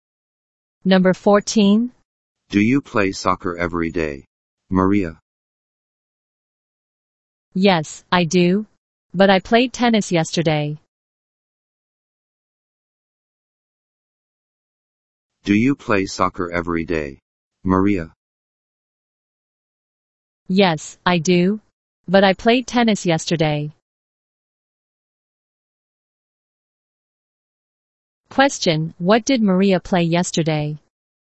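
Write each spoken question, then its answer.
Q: Question, what did Maria play yesterday?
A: Tennis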